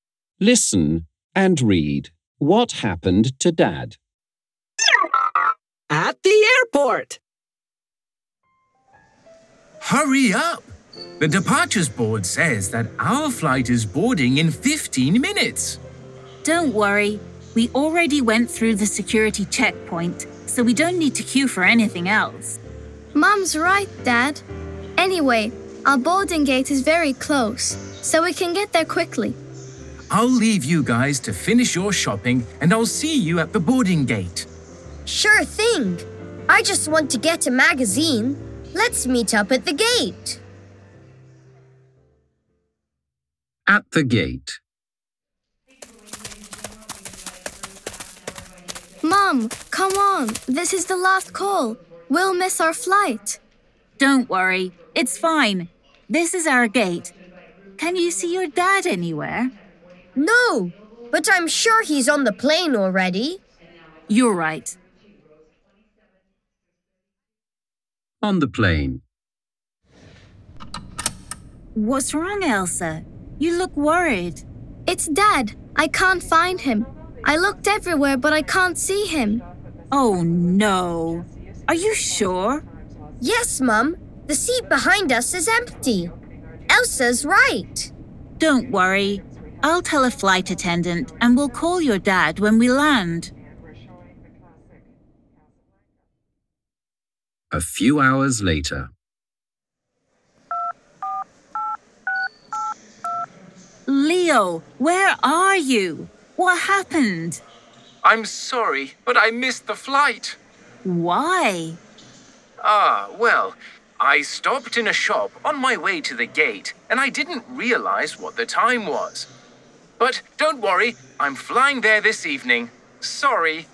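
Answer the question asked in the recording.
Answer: He missed the flight because he stopped in a shop and lost track of time.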